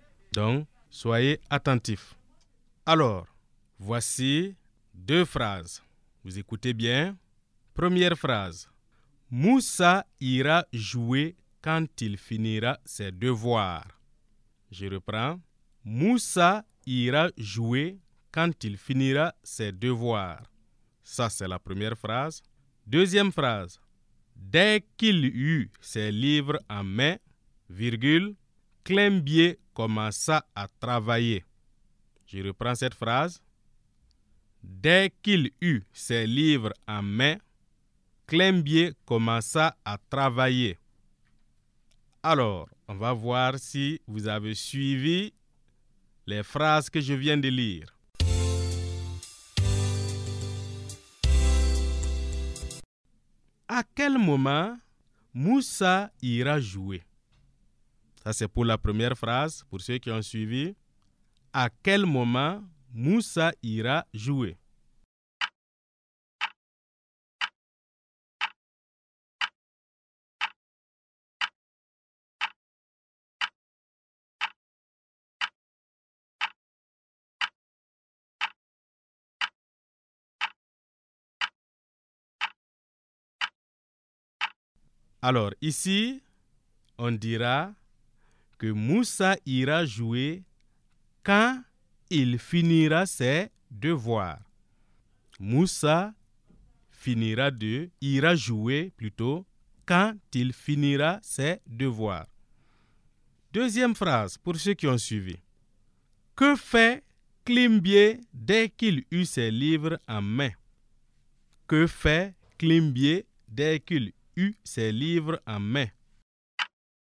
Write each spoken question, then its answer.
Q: À quel moment Moussa ira jouer?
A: Alors ici, on dira que Moussa ira jouer quand il finira ses devoirs.

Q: Que fait Climbier dès qu'il eut ses livres en main?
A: Ici, dès que Climbier a eu ses livres en main, il commença à travailler.